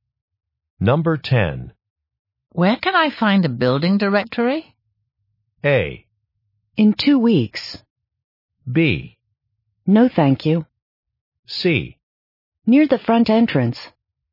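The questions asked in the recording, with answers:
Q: Where can I find a building directory?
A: C: Near the front entrance.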